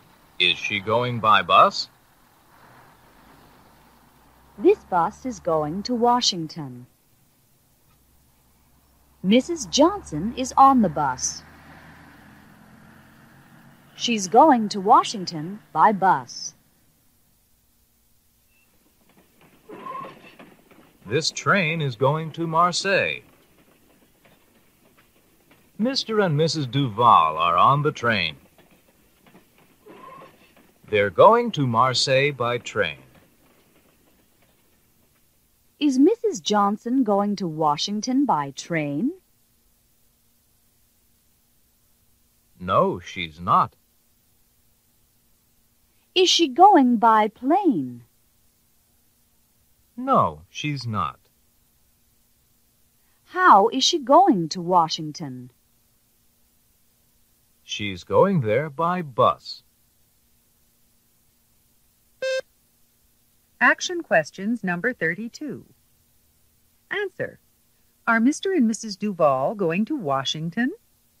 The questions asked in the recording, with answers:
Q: Are Mr. and Mrs. Duval going to Washington?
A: No, they're not.